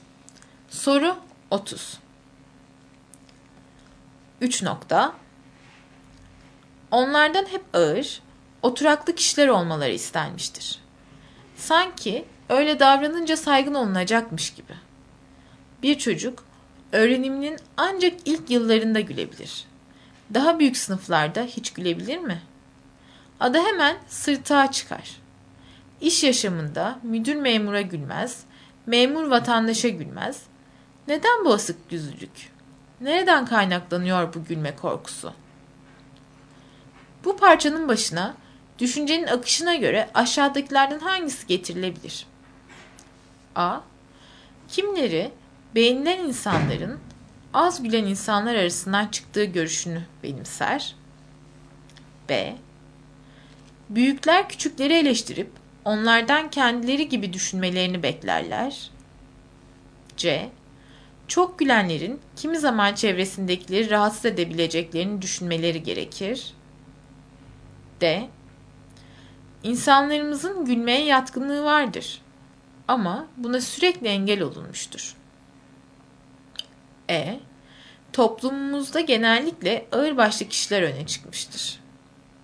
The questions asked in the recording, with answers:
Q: Bu parçanın başına düşüncenin akışına göre aşağıdakilerden hangisi getirilebilir?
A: Doğru cevap D.